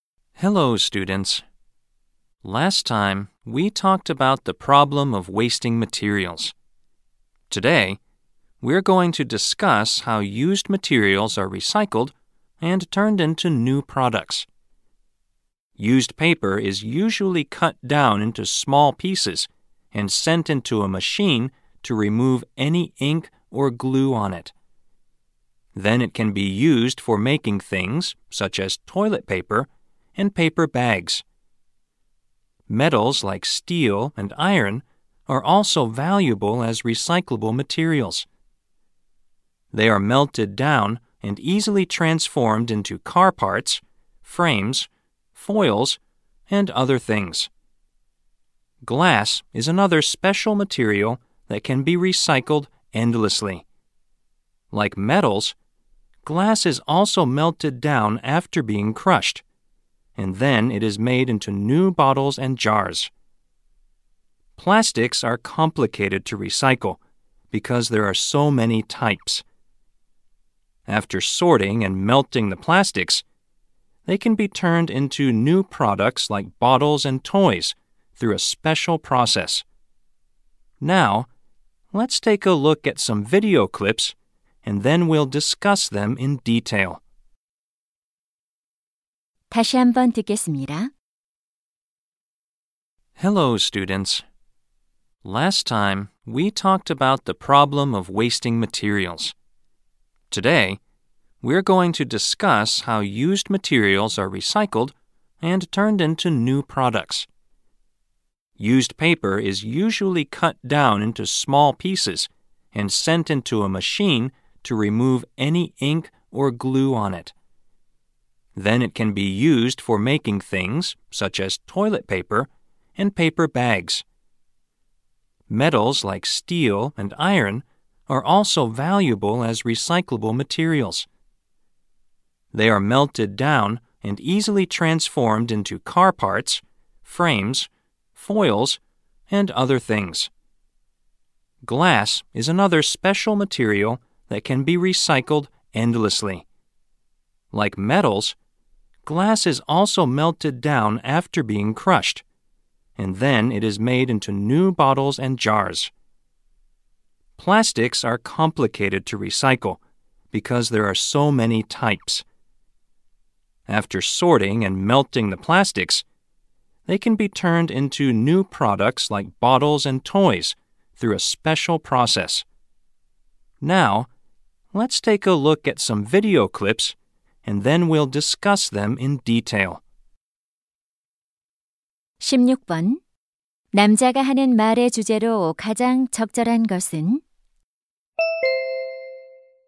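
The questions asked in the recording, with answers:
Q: 남자가 하는 말의 주제로 가장 적절한 것은?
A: 사용된 재료가 재활용되어 새 제품으로 바뀌는 방법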